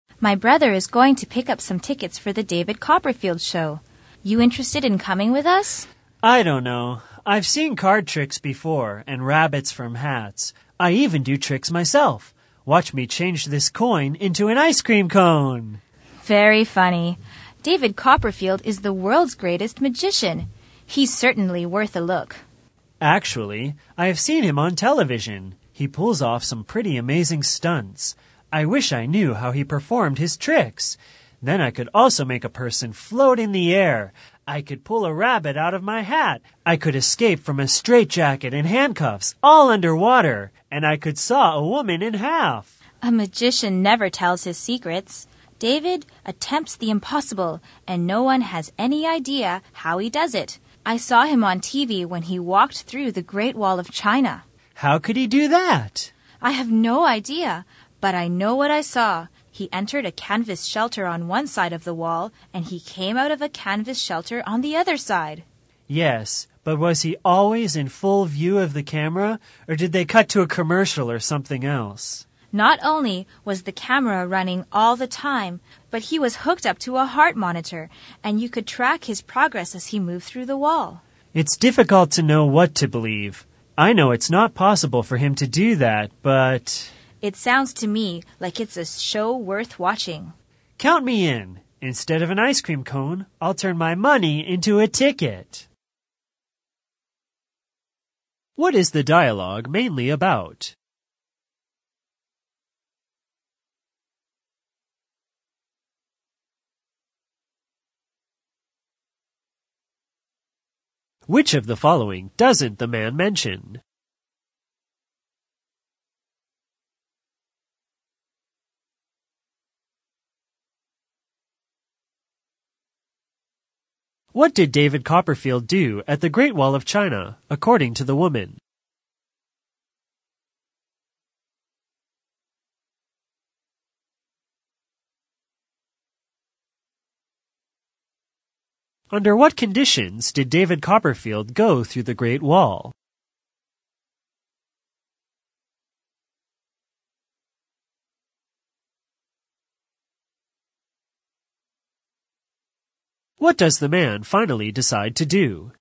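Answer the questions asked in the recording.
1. Going to see David Copperfield's magic show
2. He walked through it
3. With the camera running all the time and hooked up to a heart monitor
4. Go to the show with them (buy a ticket)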